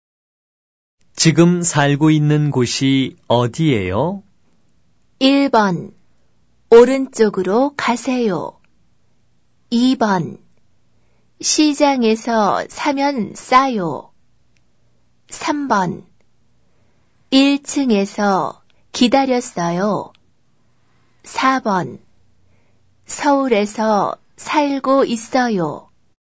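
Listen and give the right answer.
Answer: 4: 서울에서 살고 있어요.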